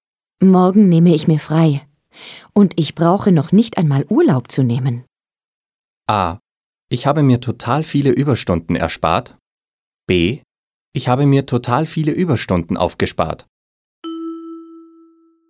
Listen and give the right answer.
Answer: B ist richtig.